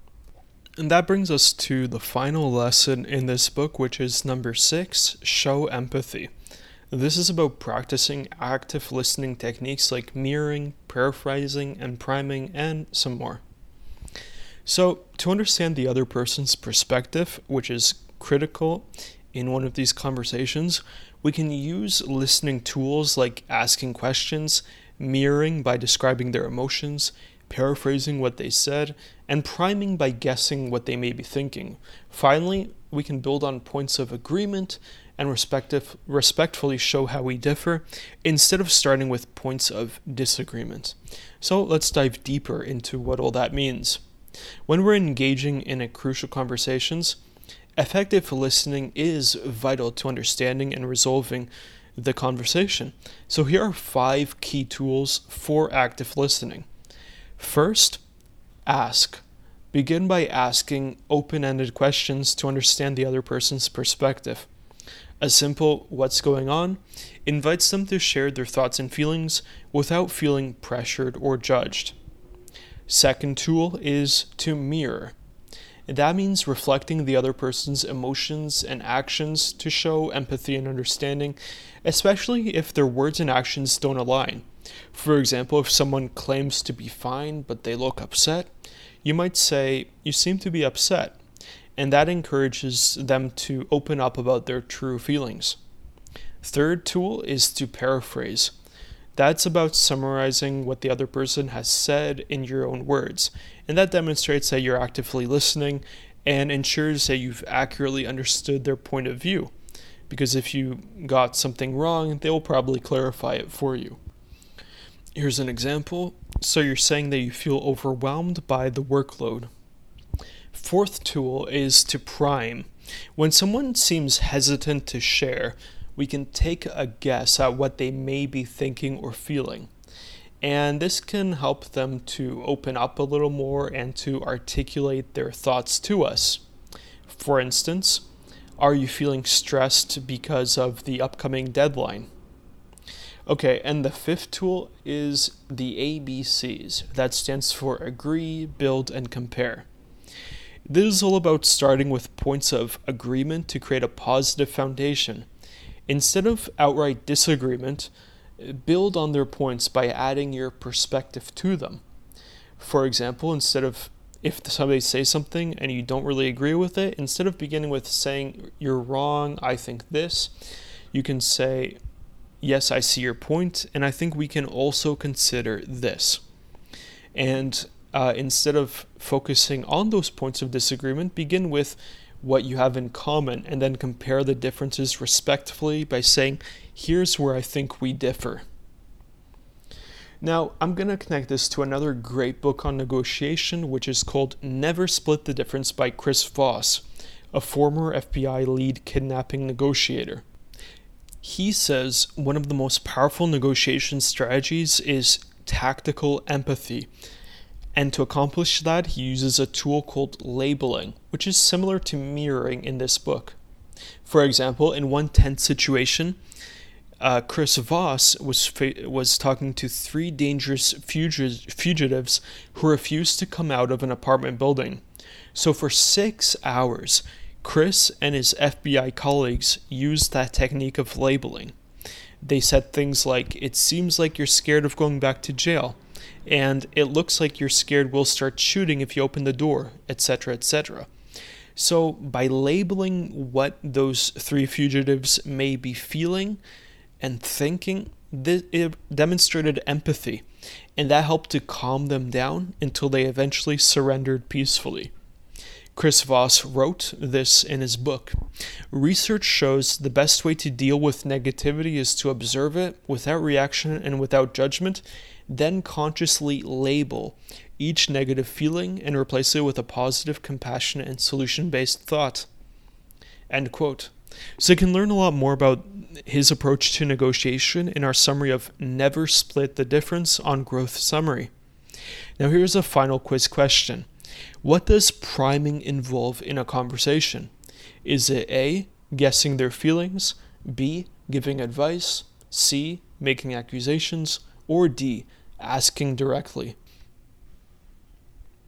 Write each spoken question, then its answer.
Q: What does priming involve in a conversation?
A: And the correct answer is A, guessing their feelings is priming.